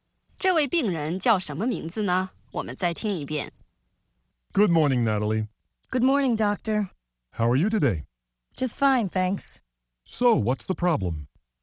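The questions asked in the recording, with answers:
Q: 这位病人叫什么名字呢?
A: Natalie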